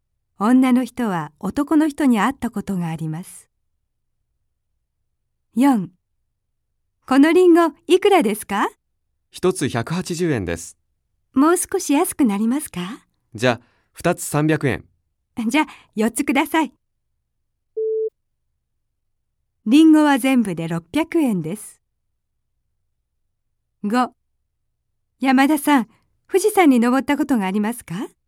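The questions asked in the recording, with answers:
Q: リンゴは全部で600円です。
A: ○(正しい)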